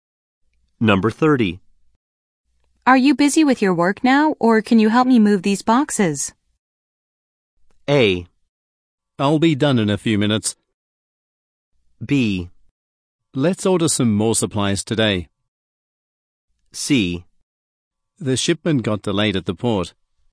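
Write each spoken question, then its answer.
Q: Are you busy with your work now, or can you help me move these boxes?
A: A: I'll be done in a few minutes.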